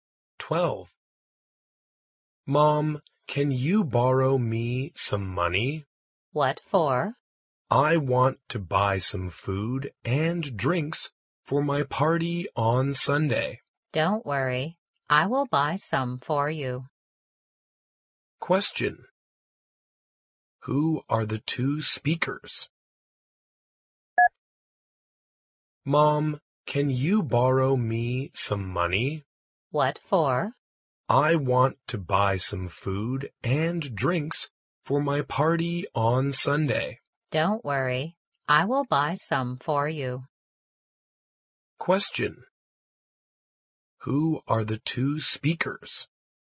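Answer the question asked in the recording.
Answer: A mother and her child.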